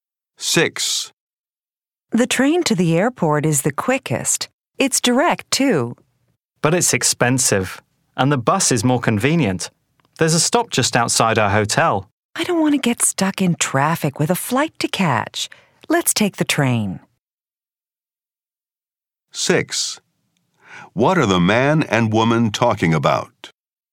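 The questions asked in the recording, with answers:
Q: What are the man and woman talking about?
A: How to get to the airport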